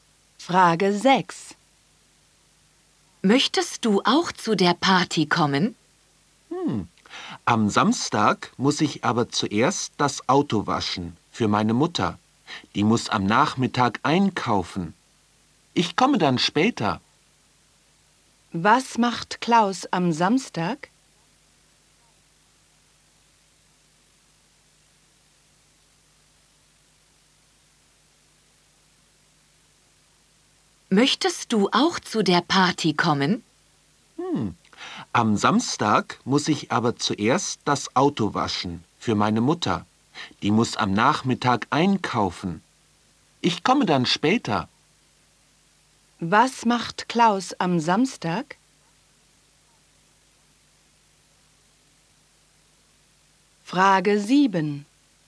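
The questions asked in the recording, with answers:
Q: Was macht Klaus am Samstag?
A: Er wäscht das Auto für seine Mutter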